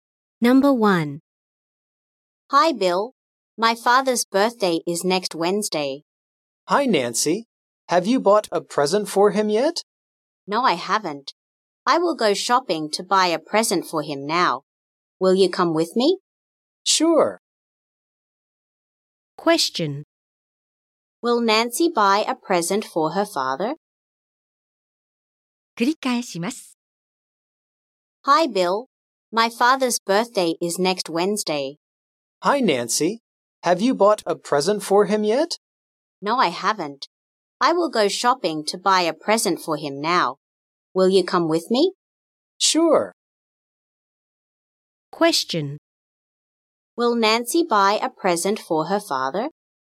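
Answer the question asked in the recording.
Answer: Yes, she will.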